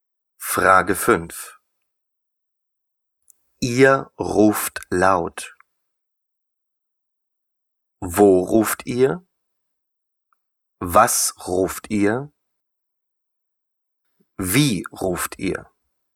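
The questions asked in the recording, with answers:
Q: Ihr ruft laut.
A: Wie ruft ihr?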